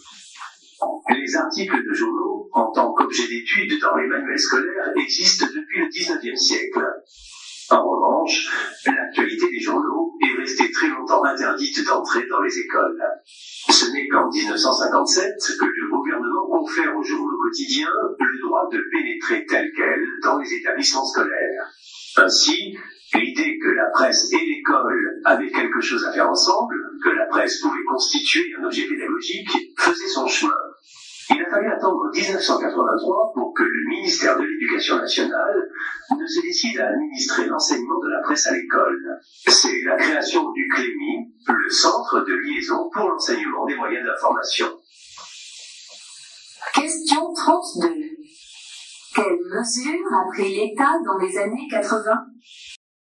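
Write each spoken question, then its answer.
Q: Quelles mesures a pris l'État dans les années 80?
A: Il a créé le CLEMI pour organiser l'enseignement de la presse à l'école (1983).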